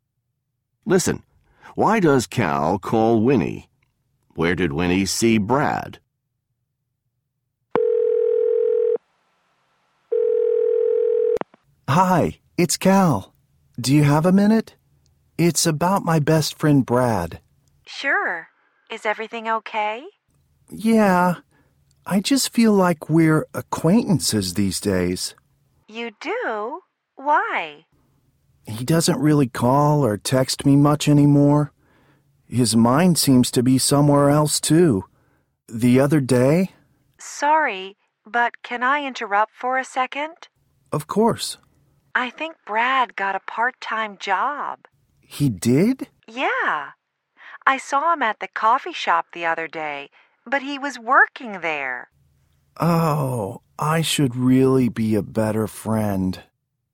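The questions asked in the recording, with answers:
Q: Why does Cal call Winnie?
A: To talk about his best friend Brad, who doesn't call or text him much anymore

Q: Where did Winnie see Brad?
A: At the coffee shop, working there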